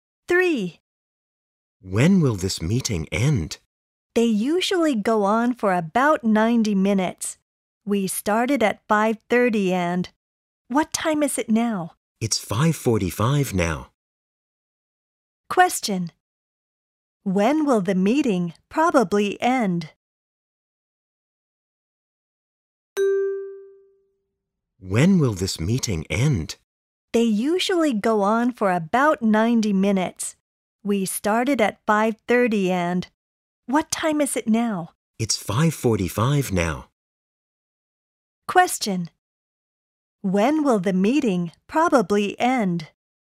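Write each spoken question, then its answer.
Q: When will the meeting probably end?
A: At 7:00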